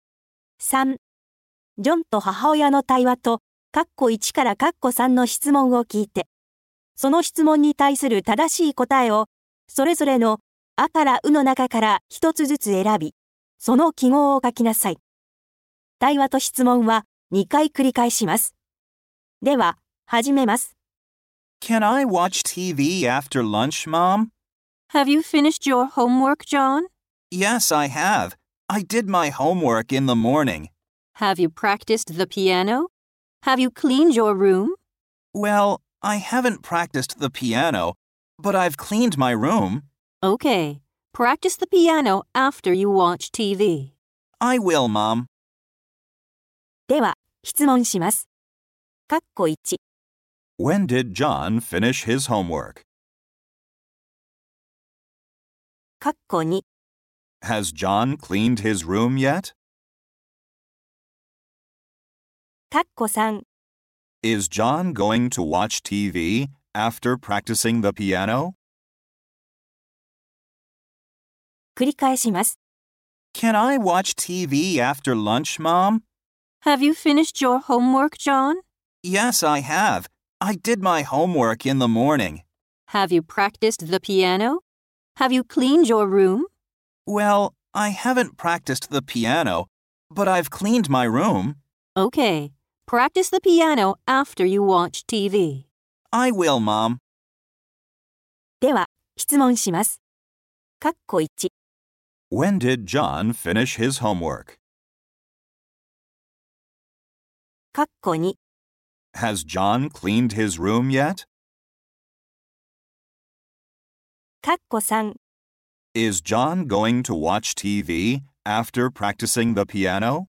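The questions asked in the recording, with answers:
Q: When did John finish his homework?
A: In the morning.

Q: Has John cleaned his room yet?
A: Yes, he has.

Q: Is John going to watch TV after practicing the piano?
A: No, he isn't.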